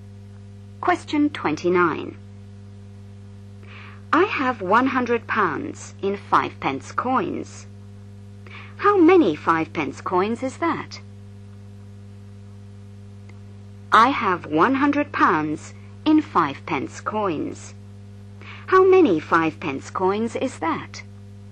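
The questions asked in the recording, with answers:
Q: How many 5 pence coins is that?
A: 2000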